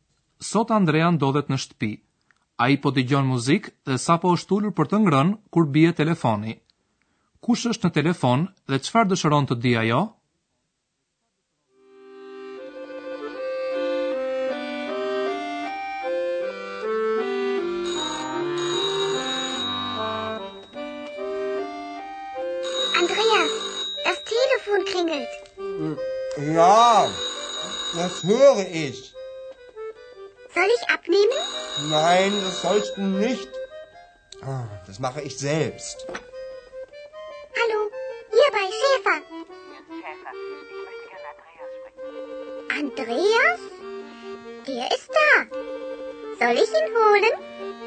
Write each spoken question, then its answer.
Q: Kush është në telefon dhe qëfar dëshëron të di ajo?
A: Personi që ka marrë në telefon do të flasë me Andrean.